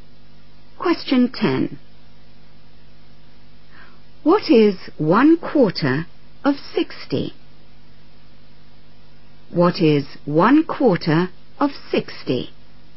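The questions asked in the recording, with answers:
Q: What is 1/4 of 60?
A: 15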